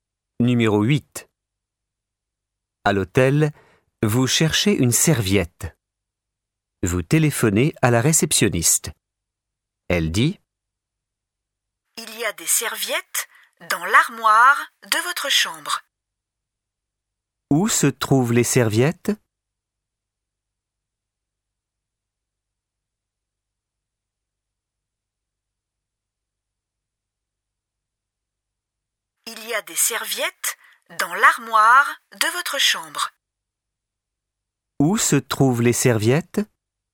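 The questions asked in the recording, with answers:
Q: Où se trouvent les serviettes?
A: Dans l'armoire de la chambre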